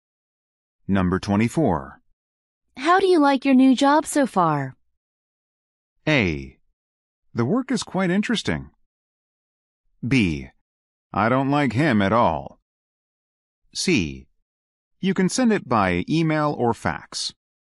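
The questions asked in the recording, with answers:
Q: How do you like your new job so far?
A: A: The work is quite interesting.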